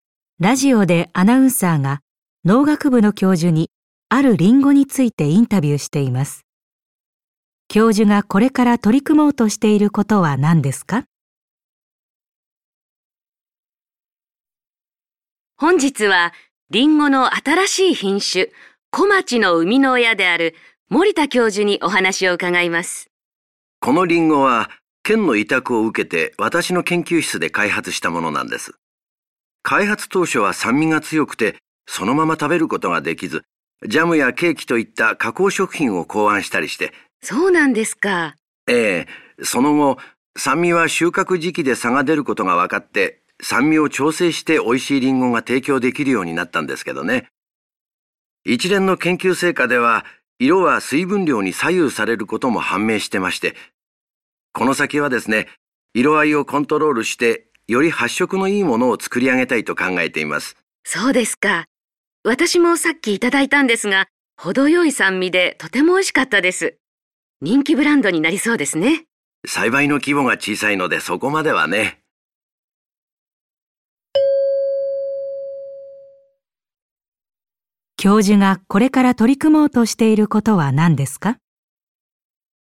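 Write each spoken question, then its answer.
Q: 教授がこれから取り組もうとしていることは何ですか?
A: 色合いをコントロールして、より発色のいいリンゴを作ること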